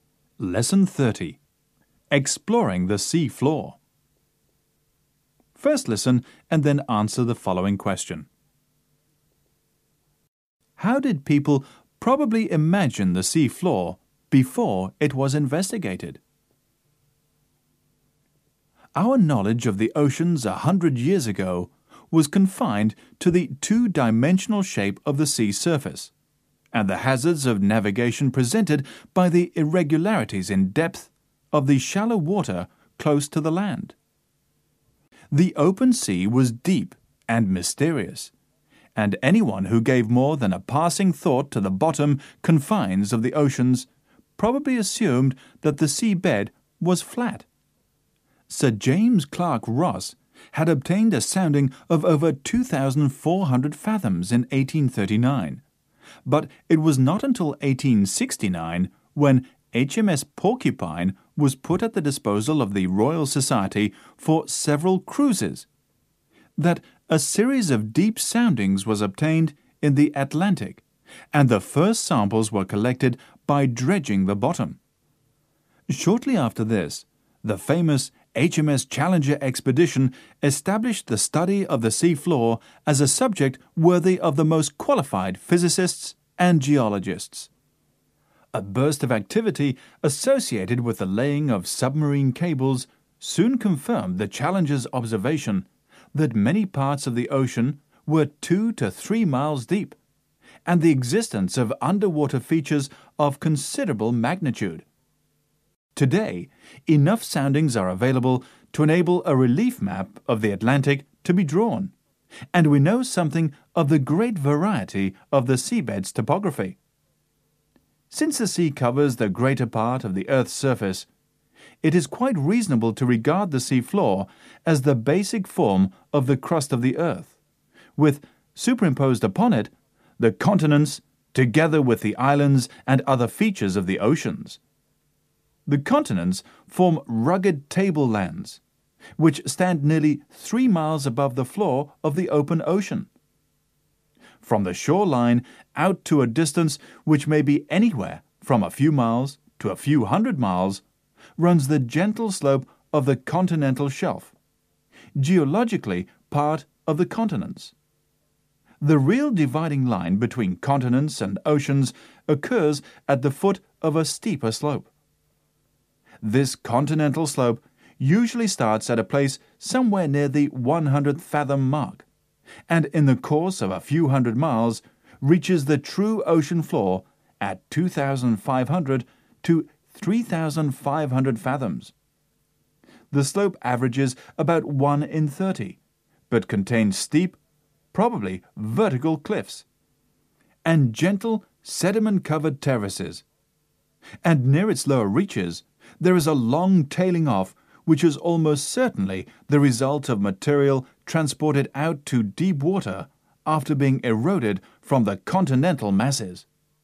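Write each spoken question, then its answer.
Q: How did people probably imagine the sea floor before it was investigated?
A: As flat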